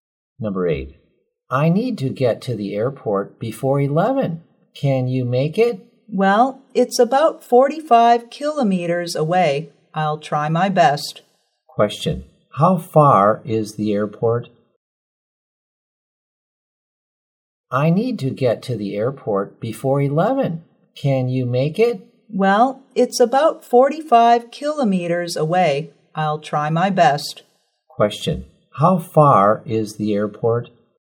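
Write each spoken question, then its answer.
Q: Question, how far is the airport?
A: About 45 kilometers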